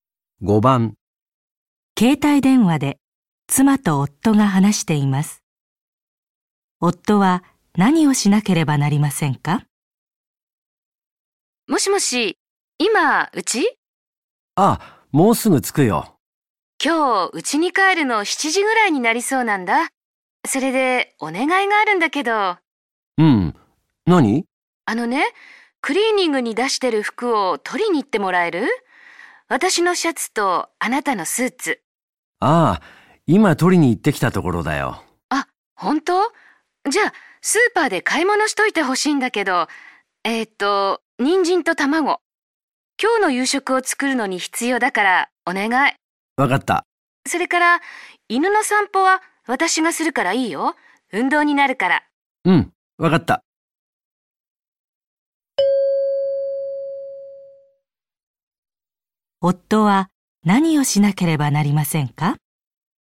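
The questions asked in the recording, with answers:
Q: 夫は何をしなければなりませんか?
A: スーパーで人参と卵を買う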